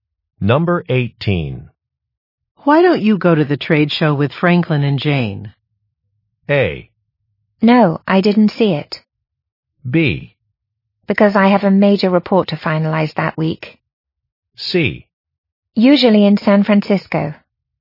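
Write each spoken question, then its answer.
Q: Why don't you go to the trade show with Franklin and Jane?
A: B: Because I have a major report to finalize that week.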